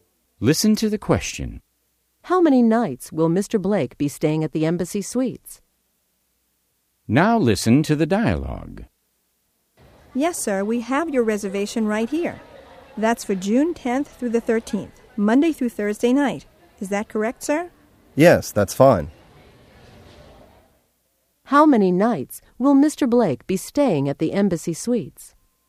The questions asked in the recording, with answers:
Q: How many nights will Mr. Blake be staying at the Embassy Suites?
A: He will be staying 4 nights, Monday through Thursday.